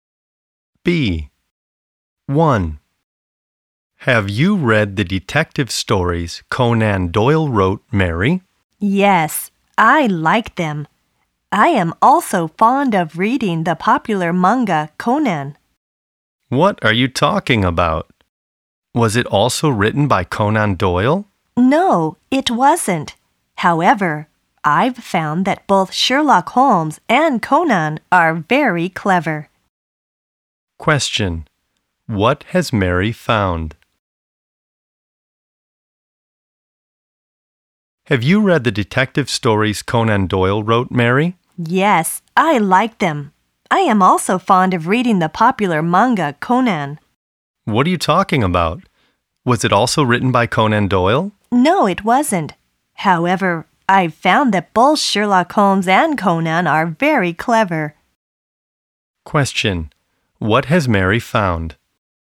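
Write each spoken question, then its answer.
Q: What has Mary found?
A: Both Sherlock Holmes and Conan are very clever.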